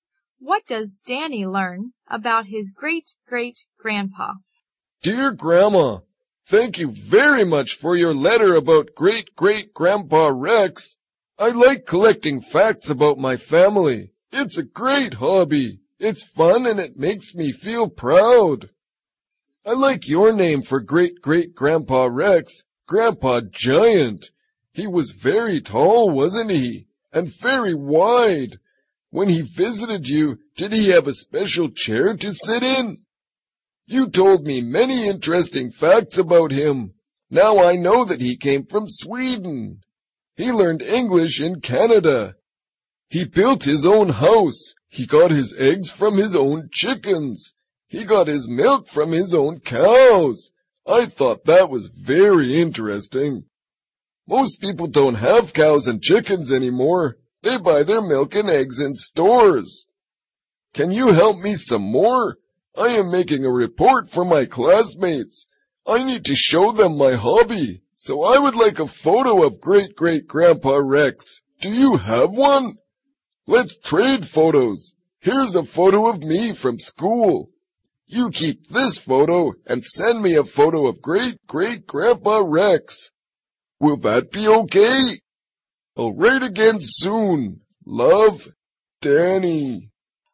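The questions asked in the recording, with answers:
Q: What does Danny learn about his great-great-grandpa?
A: He came from Sweden, learned English in Canada, built his own house, and got his eggs and milk from his own chickens and cows.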